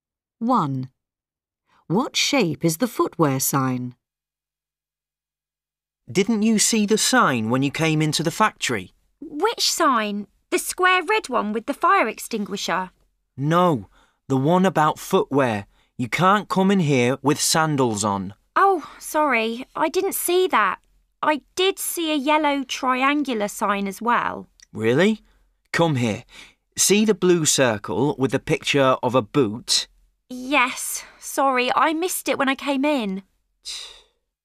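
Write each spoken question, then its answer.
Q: What shape is the footwear sign?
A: a circle (blue circle)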